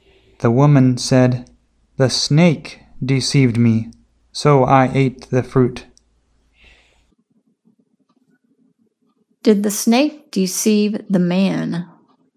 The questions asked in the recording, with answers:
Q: Did the snake deceive the man?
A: No, the snake did not deceive the man.